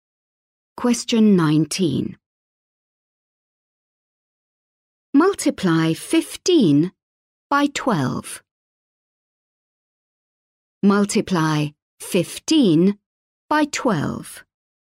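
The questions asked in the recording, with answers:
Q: Multiply 15 by 12.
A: 180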